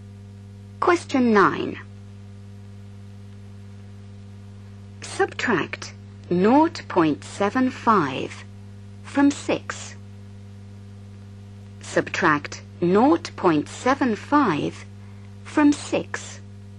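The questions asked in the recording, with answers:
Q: Subtract 0.75 from 6.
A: 5.25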